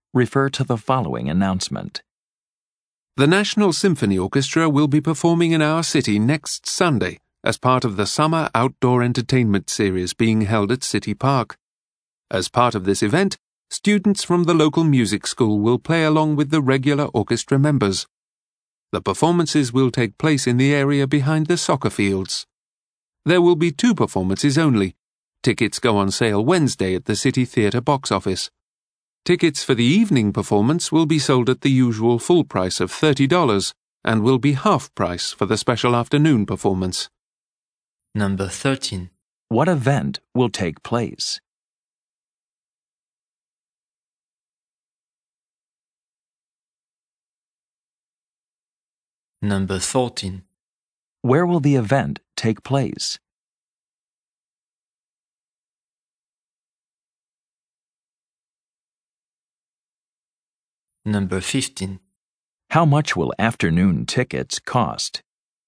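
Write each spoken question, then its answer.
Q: What event will take place?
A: A National Symphony Orchestra concert (with local music students)

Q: Where will the event take place?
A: At City Park, behind the soccer fields

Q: How much will afternoon tickets cost?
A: $15 (half price)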